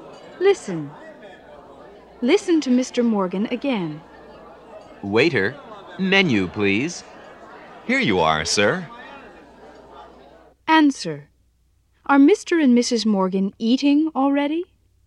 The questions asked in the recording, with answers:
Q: Are Mr. and Mrs. Morgan eating already?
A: No, they're not.